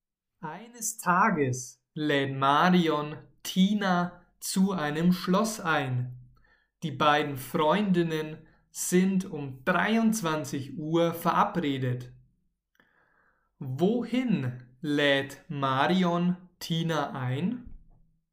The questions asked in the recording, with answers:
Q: Wohin lädt Marion Tina ein?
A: zu einem Schloss. Sie lädt Tina zu einem Schloss ein.